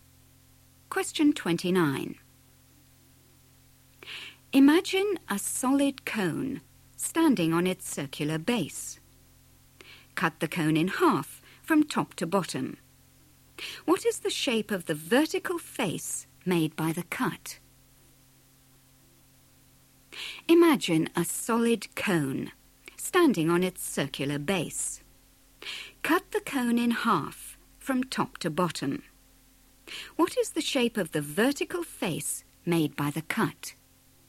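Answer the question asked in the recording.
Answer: triangle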